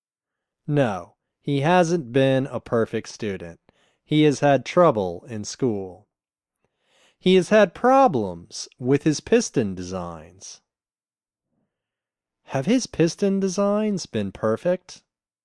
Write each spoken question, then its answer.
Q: Have his piston designs been perfect?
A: No, his piston designs haven't been perfect.